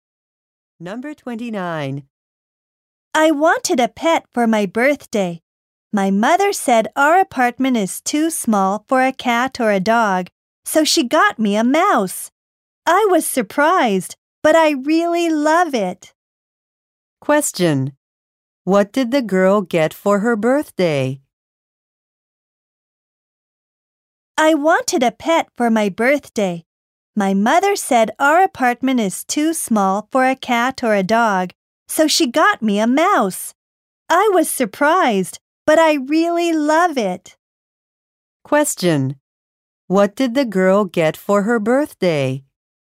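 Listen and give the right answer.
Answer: A mouse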